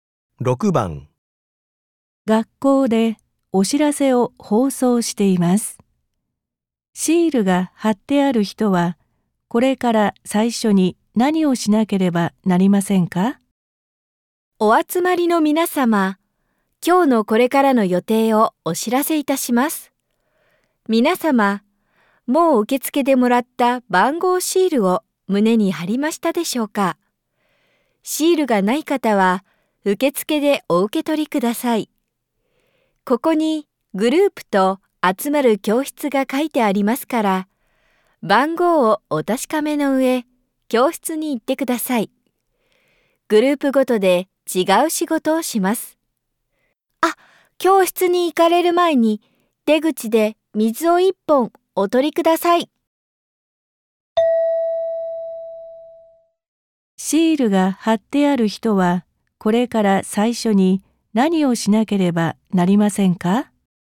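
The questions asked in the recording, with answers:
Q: シールが貼ってある人は、これから最初に何をしなければなりませんか?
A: 出口で水を一本取る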